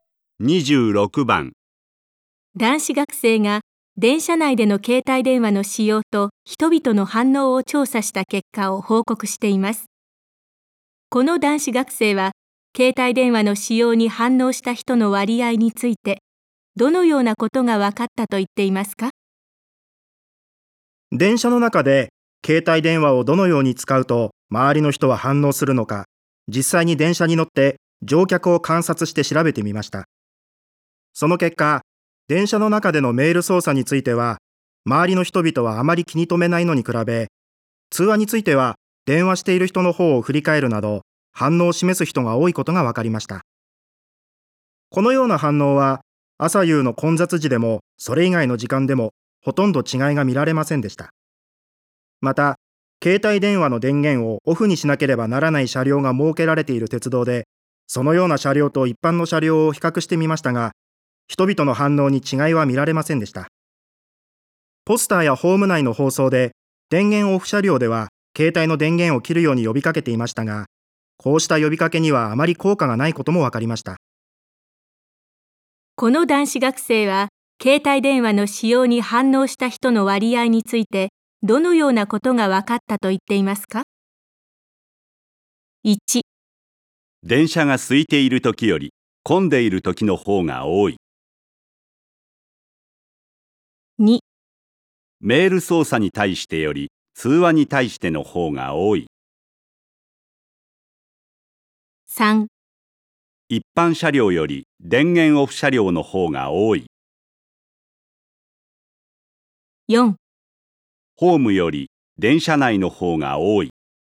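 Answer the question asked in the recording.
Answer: 2: メール操作に対してより通話に対しての方が多い。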